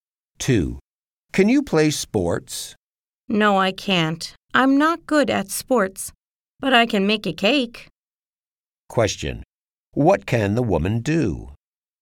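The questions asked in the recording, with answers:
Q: What can the woman do?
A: She can make a cake.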